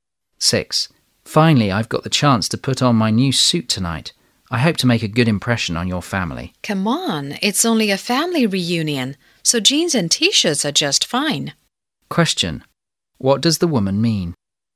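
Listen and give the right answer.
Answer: He doesn't need to dress formally; casual clothes are fine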